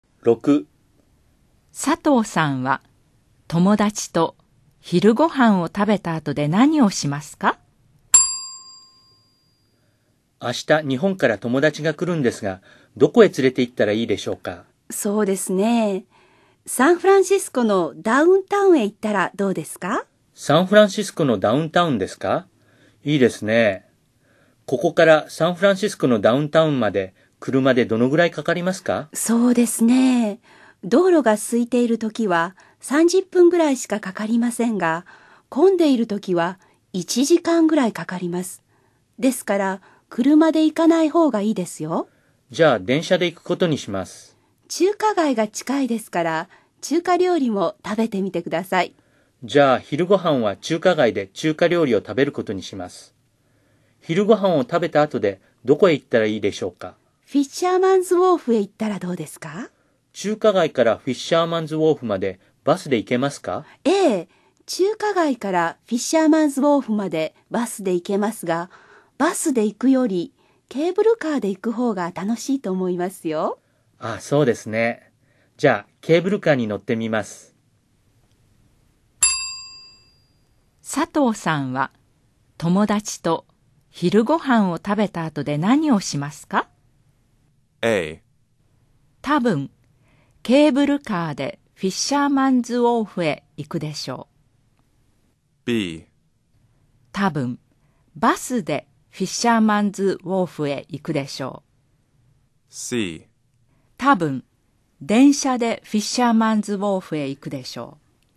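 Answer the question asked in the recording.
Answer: A: 多分ケーブルカーでフィッシャーマンズウォーフへ行くでしょう。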